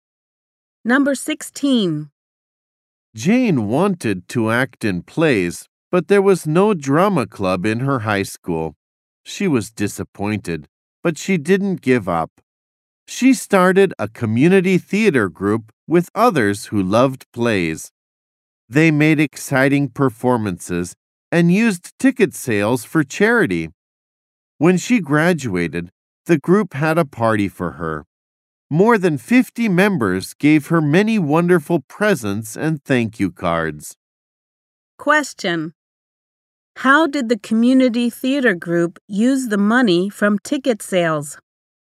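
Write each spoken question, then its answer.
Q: Question: How did the community theater group use the money from ticket sales?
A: For charity.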